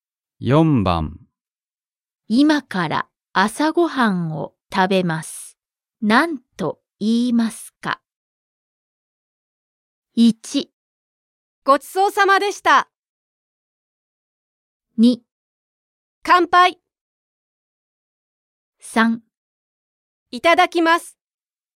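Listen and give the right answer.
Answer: 3: いただきます。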